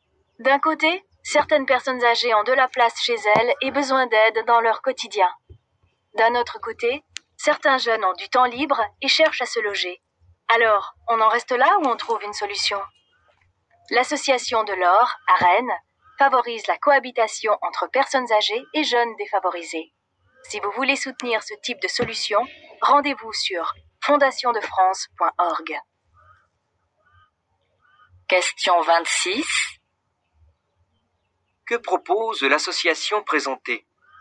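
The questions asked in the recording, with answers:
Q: Que propose l'association présentée ?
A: Elle favorise la cohabitation entre personnes âgées et jeunes défavorisés.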